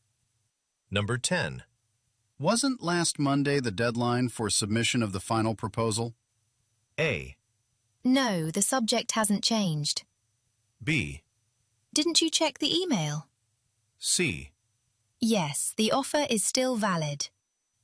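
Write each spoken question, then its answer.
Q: Wasn't last Monday the deadline for submission of the final proposal?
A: B: Didn't you check the email?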